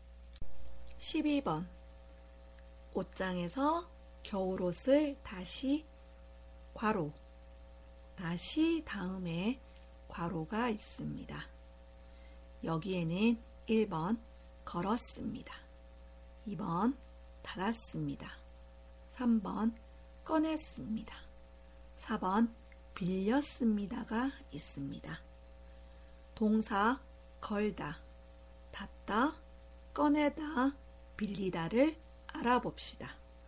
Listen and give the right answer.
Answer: 옷장에서 겨울옷을 다시 꺼냈습니다. 정답은 3번입니다.